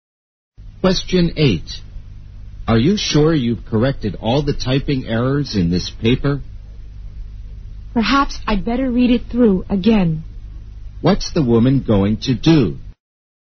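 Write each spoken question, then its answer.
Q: What's the woman going to do?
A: Read the paper through again to check for typing errors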